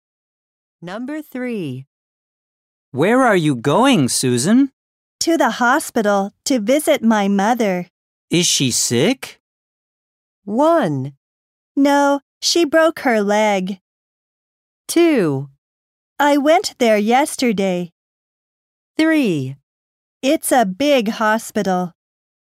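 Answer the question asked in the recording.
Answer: 1: No, she broke her leg.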